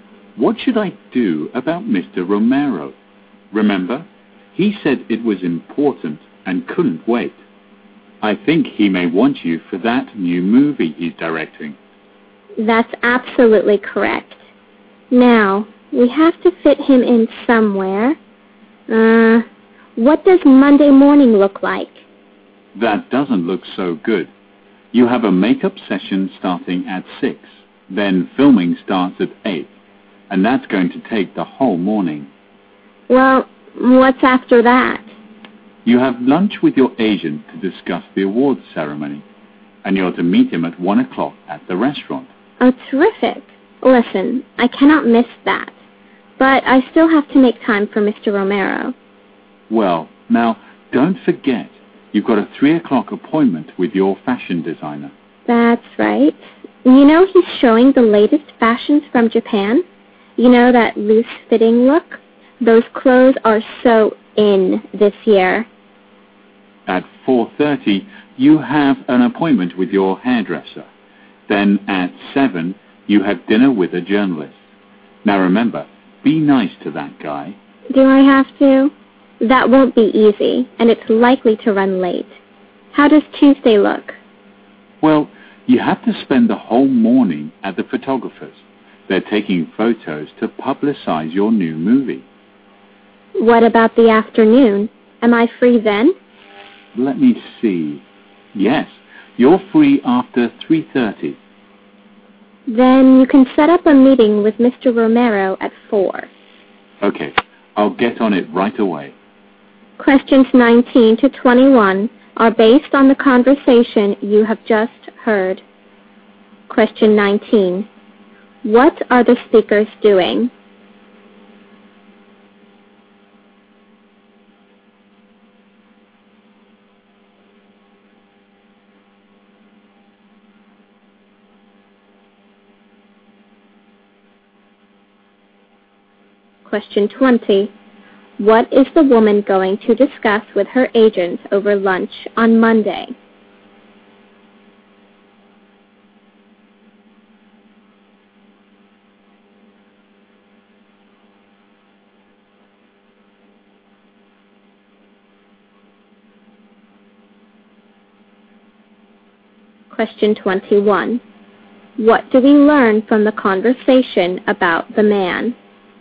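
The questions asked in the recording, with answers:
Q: What are the speakers doing?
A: Arranging the woman's schedule.

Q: What is the woman going to discuss with her agent over lunch on Monday?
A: The awards ceremony.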